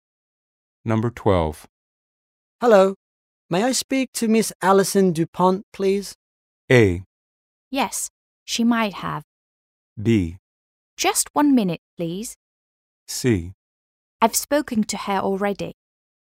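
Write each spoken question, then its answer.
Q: Hello. May I speak to Miss Alison DuPont, please?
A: B: Just 1 minute, please.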